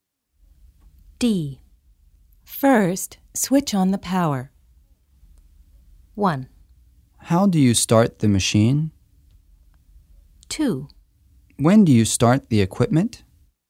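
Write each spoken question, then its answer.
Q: First, switch on the power.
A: 1: How do you start the machine?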